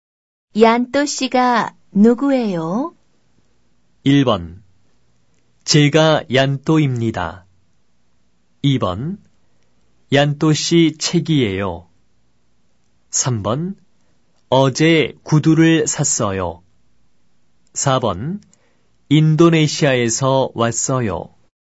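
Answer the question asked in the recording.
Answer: 1: 제가 얀또입니다.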